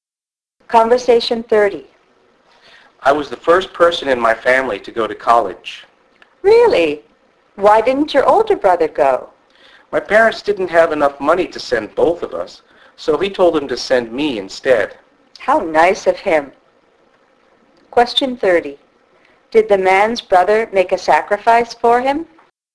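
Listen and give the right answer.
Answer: Yes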